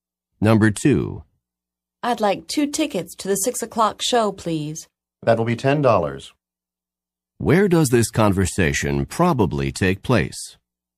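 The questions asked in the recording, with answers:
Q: Where does this conversation probably take place?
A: At a theater ticket window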